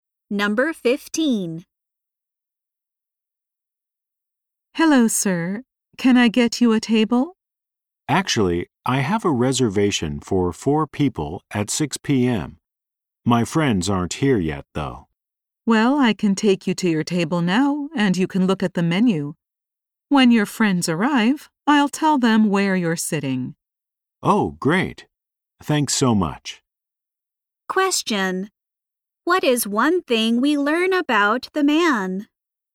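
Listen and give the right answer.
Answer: He has a reservation for four people at 6 p.m.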